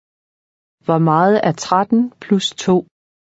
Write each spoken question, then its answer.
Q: Hvor meget er 13 plus 2?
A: 15.